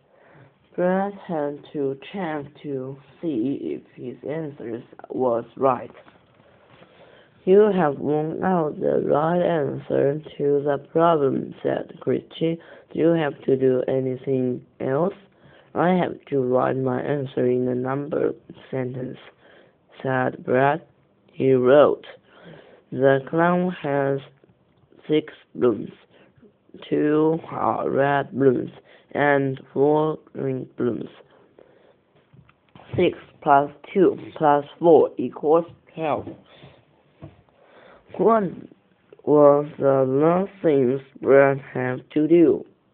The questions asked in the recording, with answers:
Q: What was the last thing Brad had to do?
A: The last thing Brad had to do was write his answer in a number sentence.